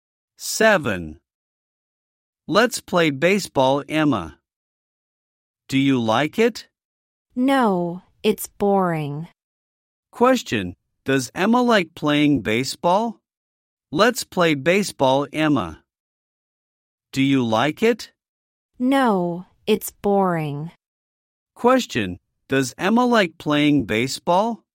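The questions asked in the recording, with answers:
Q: Question, does Emma like playing baseball?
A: No, she thinks it's boring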